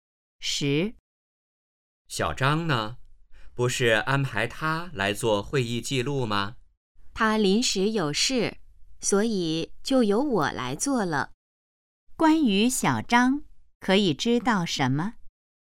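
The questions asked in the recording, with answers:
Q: 关于小张,可以知道什么?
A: 他临时有事,没来做会议记录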